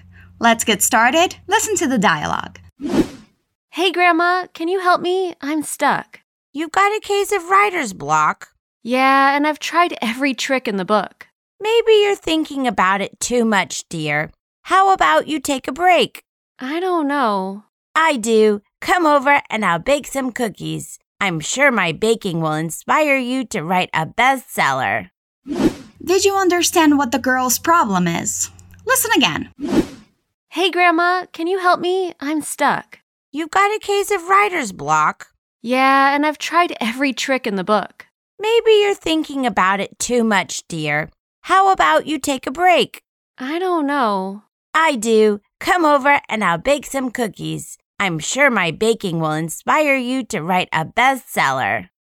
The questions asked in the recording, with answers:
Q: Did you understand what the girl's problem is?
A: It seems she's struggling with writer's block.